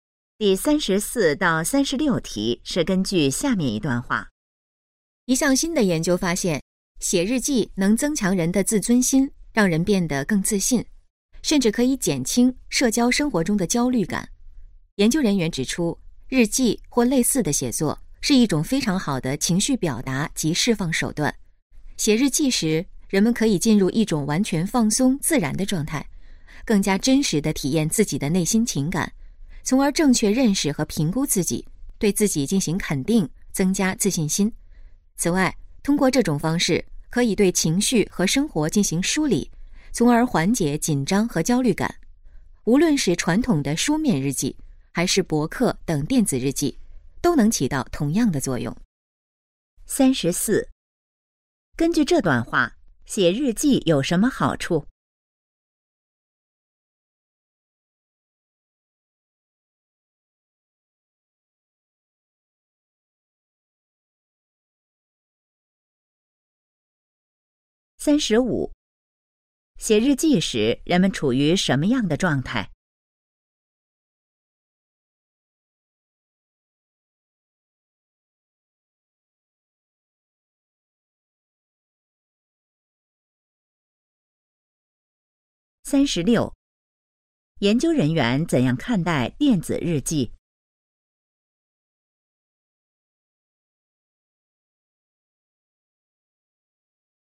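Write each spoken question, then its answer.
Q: 根据这段话,写日记有什么好处?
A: 增强自尊心和自信,减轻焦虑

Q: 写日记时人们处于什么样的状态?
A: 完全放松自然的状态

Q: 研究人员怎样看待电子日记?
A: 和书面日记作用一样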